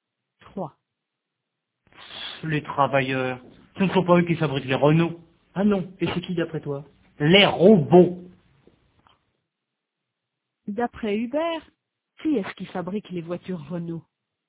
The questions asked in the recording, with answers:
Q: D'après Hubert, qui est-ce qui fabrique les voitures Renault?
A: Les robots.